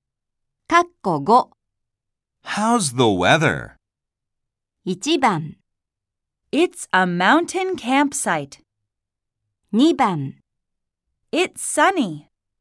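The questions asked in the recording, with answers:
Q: How's the weather?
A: 2: It's sunny.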